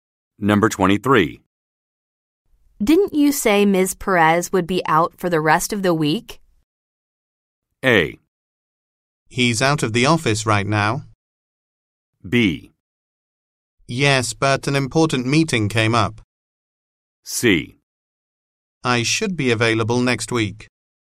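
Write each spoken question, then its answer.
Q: Didn't you say Ms. Perez would be out for the rest of the week?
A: B: Yes, but an important meeting came up.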